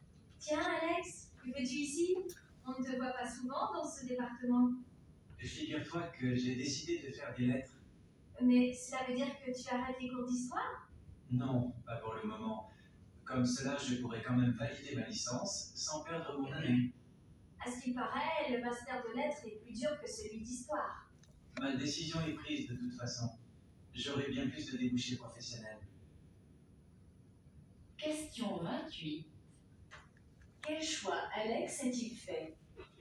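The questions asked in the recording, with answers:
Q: Quel choix Alex a-t-il fait ?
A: Il a décidé de faire des lettres, sans arrêter pour le moment ses cours d'histoire.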